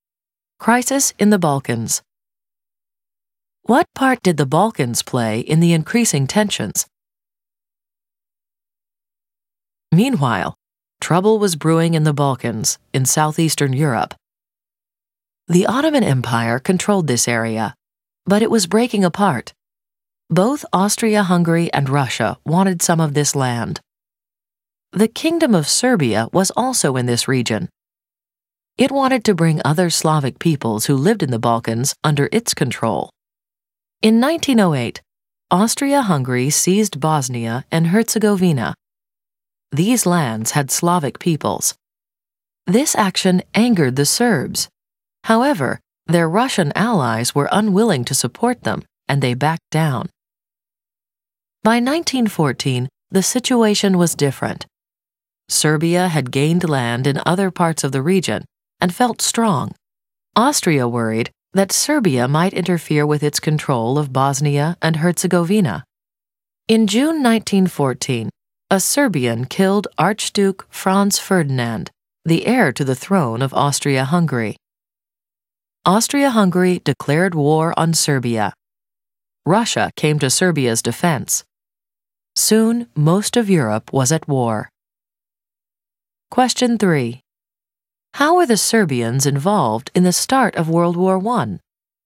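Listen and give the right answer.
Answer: A Serbian killed Archduke Franz Ferdinand, so Austria-Hungary declared war on Serbia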